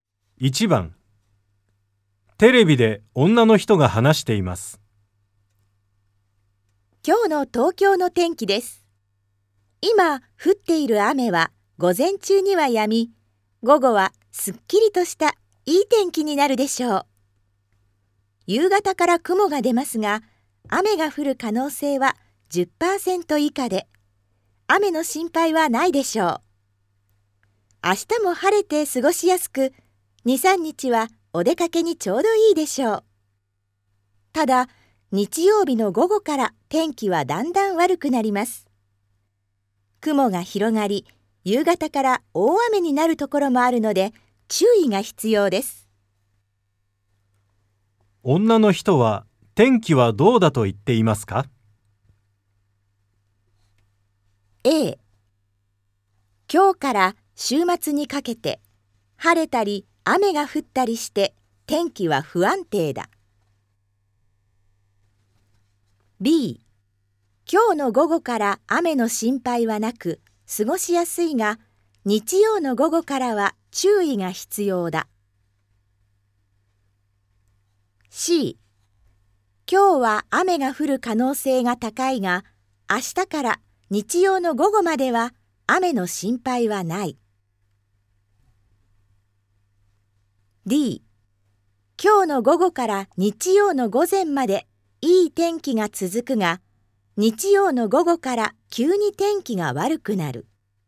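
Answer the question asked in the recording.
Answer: B: 今日の午後から雨の心配はなく過ごしやすいが、日曜の午後からは注意が必要だ。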